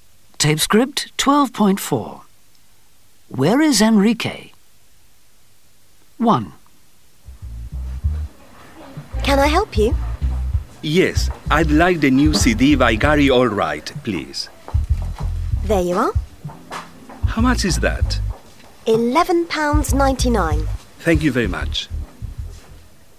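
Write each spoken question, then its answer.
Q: Where is Enrique?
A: In a music shop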